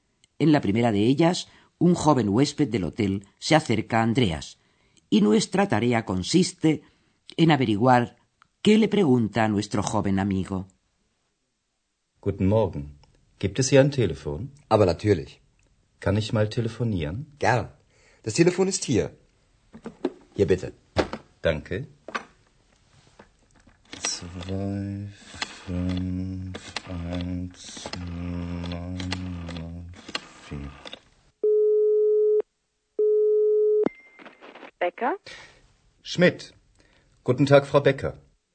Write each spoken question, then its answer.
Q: nuestra tarea consiste en averiguar qué le pregunta a nuestro joven amigo.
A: ¿Percibieron ustedes cómo el joven preguntaba dónde había un teléfono?